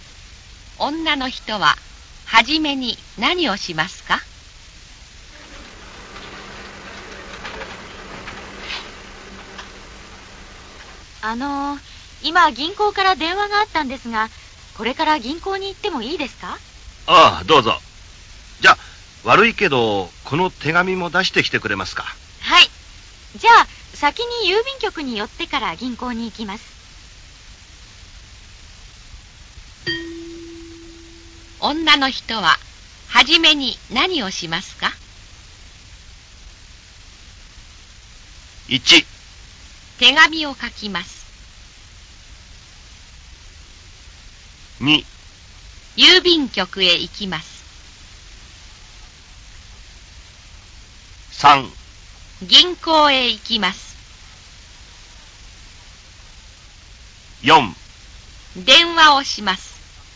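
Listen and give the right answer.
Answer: 2: 郵便局へ行きます。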